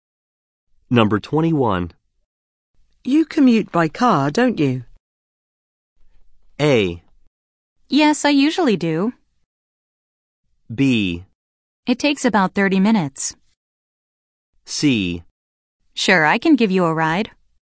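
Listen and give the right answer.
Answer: A: Yes, I usually do.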